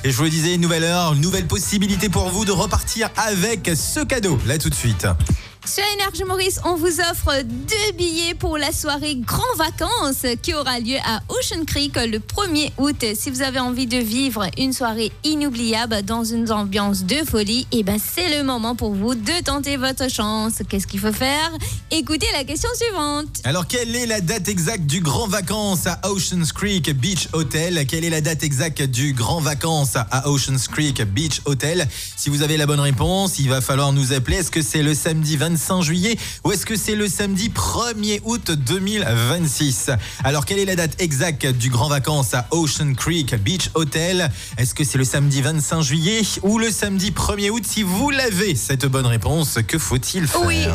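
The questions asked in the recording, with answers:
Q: Alors, quelle est la date exacte du Grand Vacances à Ocean Creek Beach Hotel?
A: le samedi 1er août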